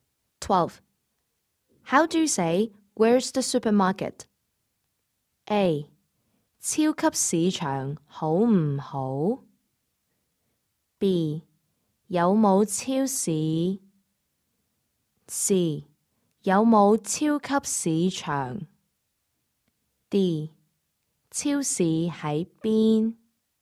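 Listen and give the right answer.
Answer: D: 超市喺边?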